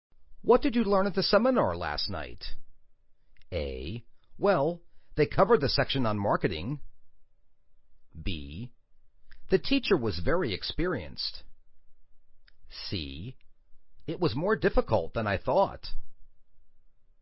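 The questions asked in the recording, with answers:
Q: What did you learn at the seminar last night?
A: A: Well, they covered the section on marketing.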